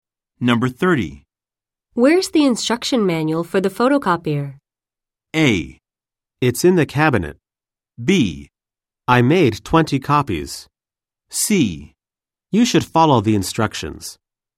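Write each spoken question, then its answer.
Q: Where's the instruction manual for the photocopier?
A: A: It's in the cabinet.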